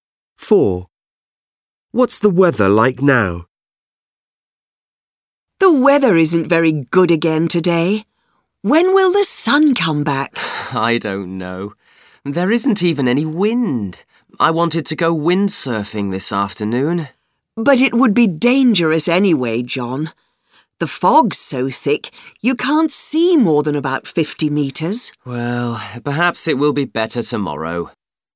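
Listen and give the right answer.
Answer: Foggy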